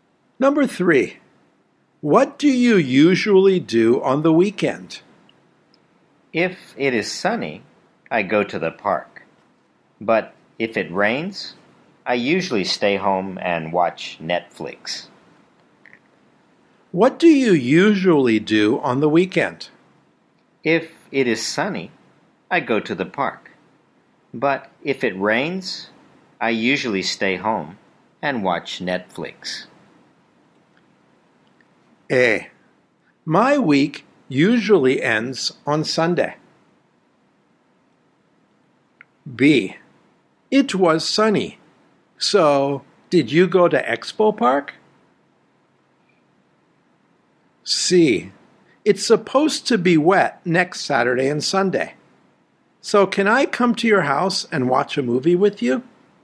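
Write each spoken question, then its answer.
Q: What do you usually do on the weekend?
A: C: It's supposed to be wet next Saturday and Sunday. So, can I come to your house and watch a movie with you?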